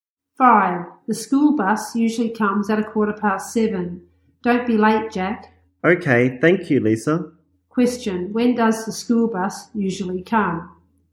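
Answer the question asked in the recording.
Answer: At 7:15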